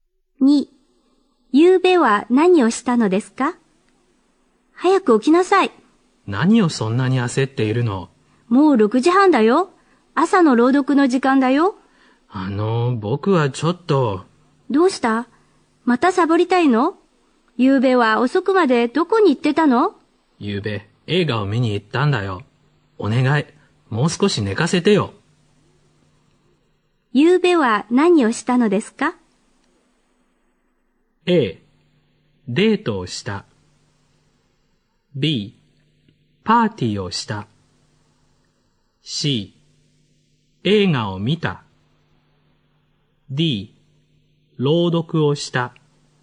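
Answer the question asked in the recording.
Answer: C: 映画を見た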